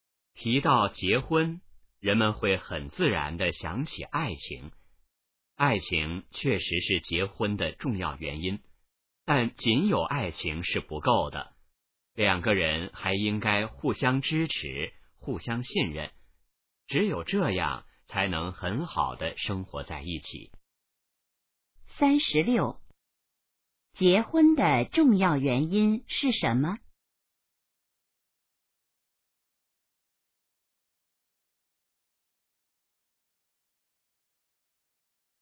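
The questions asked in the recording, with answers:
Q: 结婚的重要原因是什么?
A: 爱情

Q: 两个人怎样才能很好的一起生活?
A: 互相支持,互相信任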